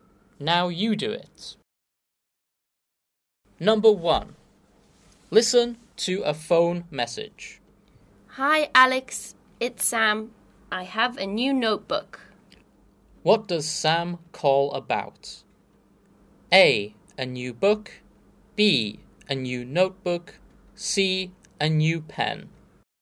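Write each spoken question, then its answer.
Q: What does Sam call about?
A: B: A new notebook.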